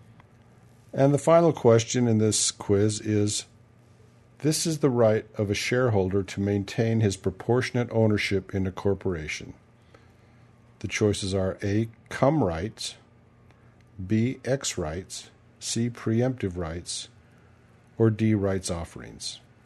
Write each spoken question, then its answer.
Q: this is the right of a shareholder to maintain his proportionate ownership in a corporation.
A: And the answer is preemptive rights.